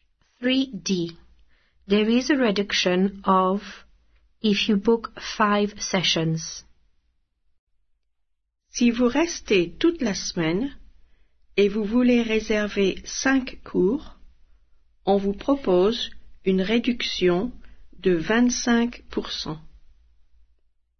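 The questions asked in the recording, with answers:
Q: There is a reduction of if you book 5 sessions.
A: 25%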